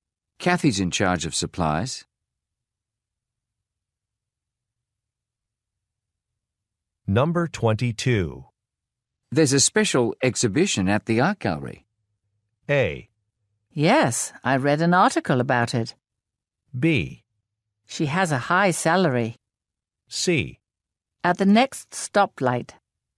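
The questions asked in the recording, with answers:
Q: There's a special exhibition at the art gallery.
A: A: Yes, I read an article about it.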